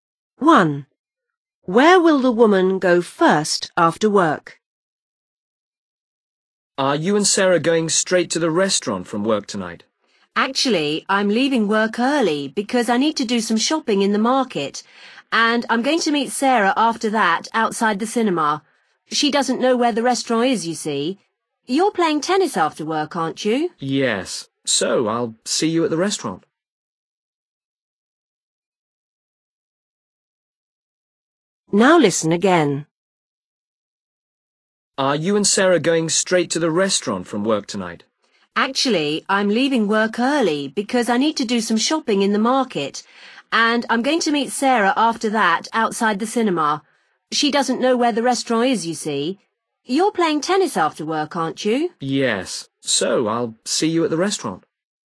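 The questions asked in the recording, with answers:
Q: Where will the woman go first after work?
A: the market (shopping)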